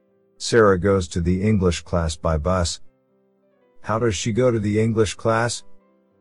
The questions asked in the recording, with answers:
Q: How does she go to the English class?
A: By bus.